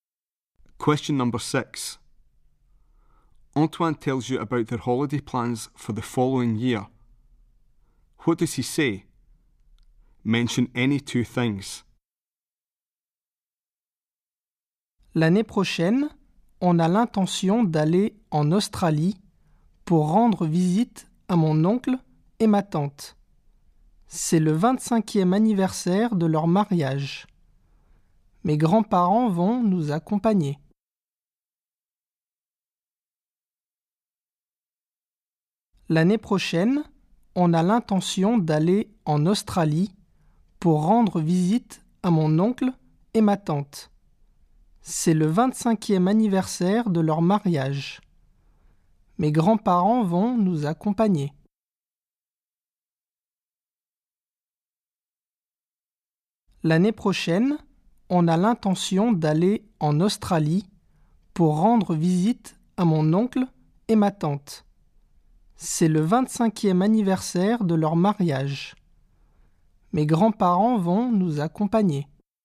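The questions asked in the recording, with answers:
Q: What does he say? Mention any two things.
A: Going to Australia next year to visit his uncle and aunt; it's their 25th wedding anniversary; his grandparents will go with them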